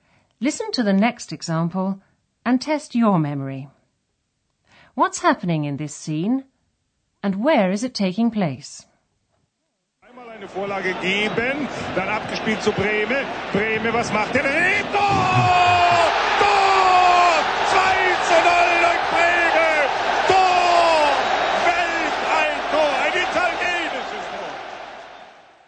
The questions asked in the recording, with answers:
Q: What's happening in this scene and where is it taking place?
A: that was an excerpt from a football commentary